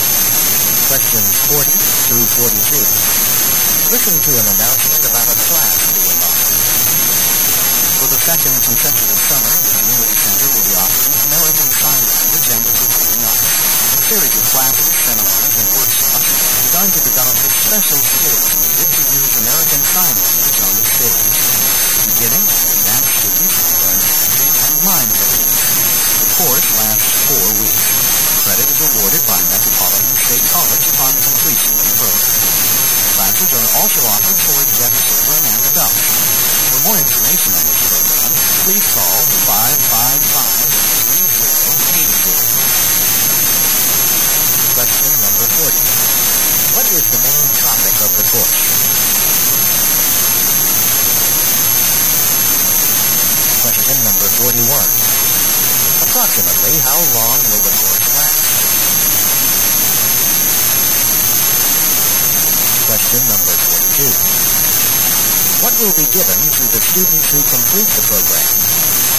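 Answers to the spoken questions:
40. Using American Sign Language in the performing arts
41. Four weeks
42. College credit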